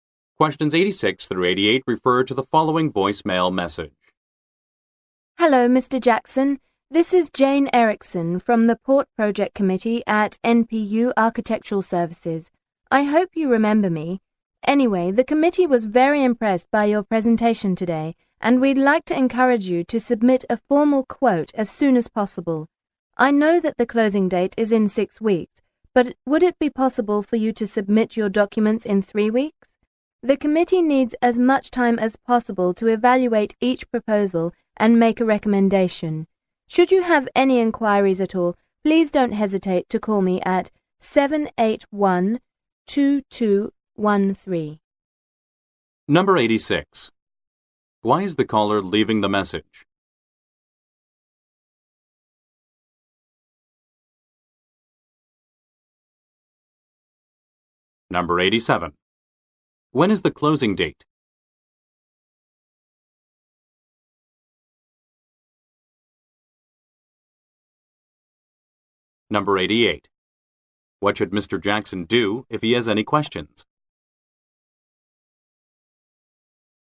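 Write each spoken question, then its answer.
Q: Why is the caller leaving the message?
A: To ask him to submit a formal quote early

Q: When is the closing date?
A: In 6 weeks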